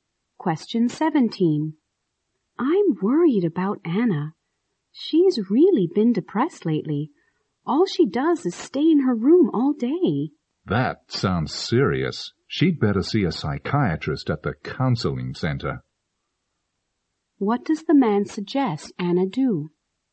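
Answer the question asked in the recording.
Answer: See a psychiatrist at the counseling center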